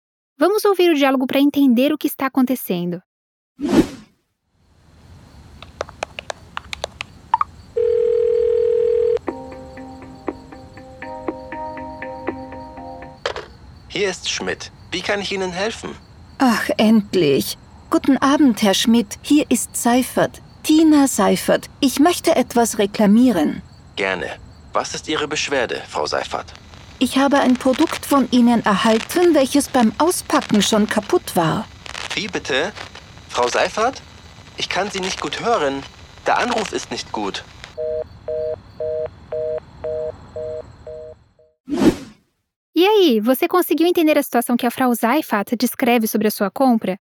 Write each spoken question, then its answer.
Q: E aí, você conseguiu entender a situação que a Frau Seifert descreve sobre a sua compra?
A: Eu recebi um produto de vocês que, ao desembrulhar, já estava quebrado.